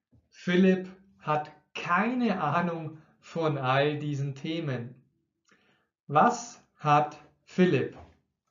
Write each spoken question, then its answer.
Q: Was hat Philipp?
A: Keine Ahnung. Philipp hat keine Ahnung von all diesen Themen.